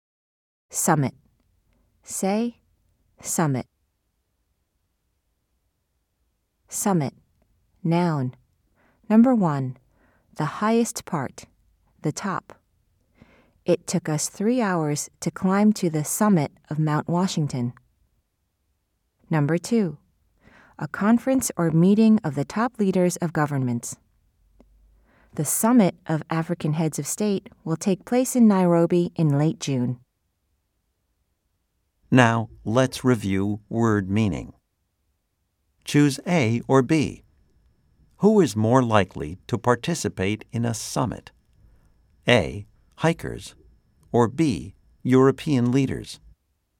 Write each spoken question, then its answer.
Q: Choose A or B. Who is more likely to participate in a summit?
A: If you said B, you are correct.